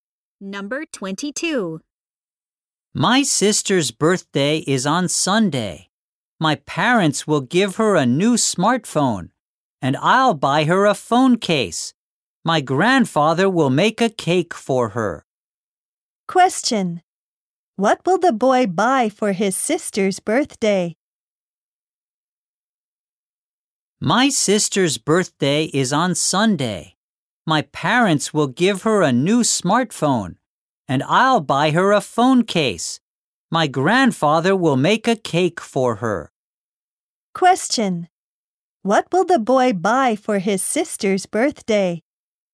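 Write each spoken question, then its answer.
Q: Question. What will the boy buy for his sister's birthday?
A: A phone case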